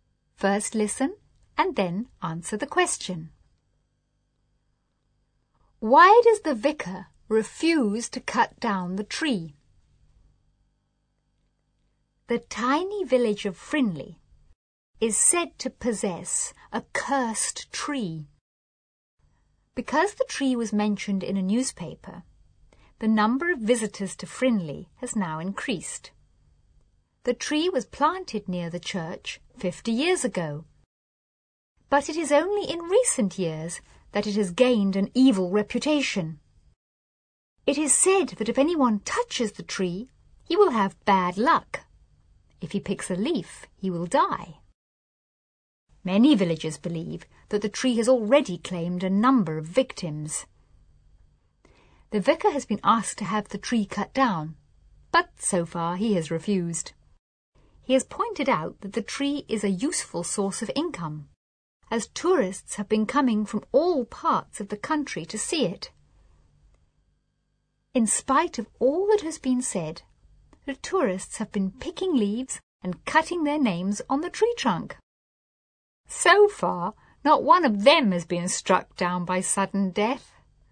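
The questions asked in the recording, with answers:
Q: Why does the vicar refuse to cut down the tree?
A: Because it is a useful source of income, as tourists come from all over the country to see it.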